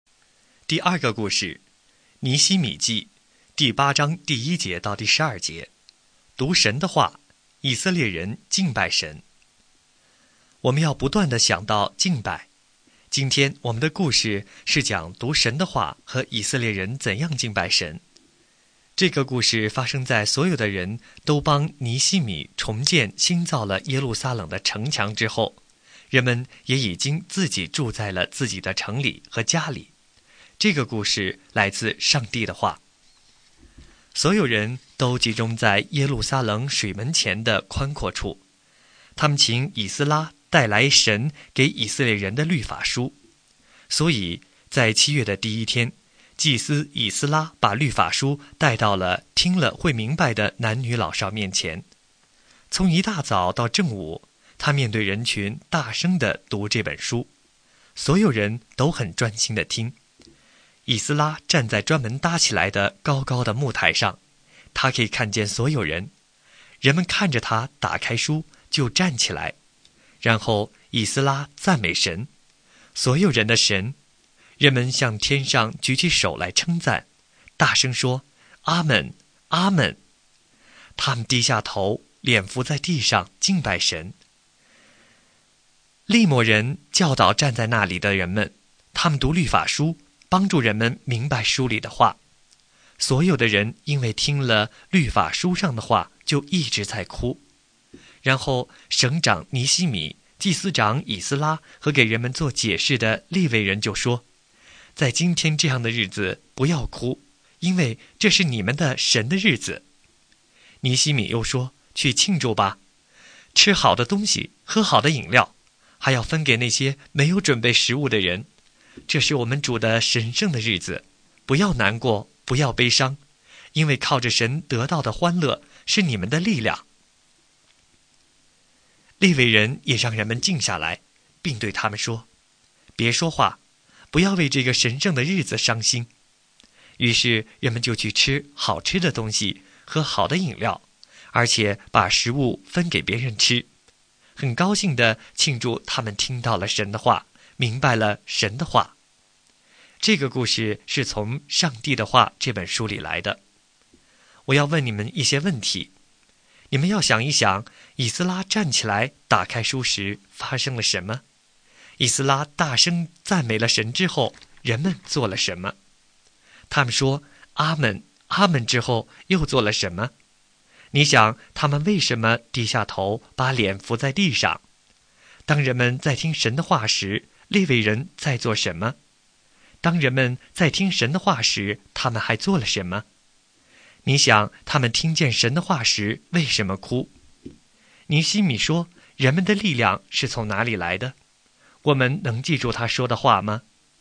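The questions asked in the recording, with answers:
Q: 以斯拉站起来打开书时发生了什么?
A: 人们都站了起来

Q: 以斯拉大声赞美了神之后,人们做了什么?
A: 向天上举起手来,大声说阿们,阿们

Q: 他们说阿们阿们之后又做了什么?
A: 低下头,脸伏在地上敬拜神

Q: 当人们在听神的话时,利未人在做什么?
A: 教导人们,读律法书,帮助人们明白书里的话

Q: 当人们在听神的话时,他们还做了什么?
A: 一直在哭

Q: 尼希米说,人们的力量是从哪里来的?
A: 靠神得到的快乐是我们的力量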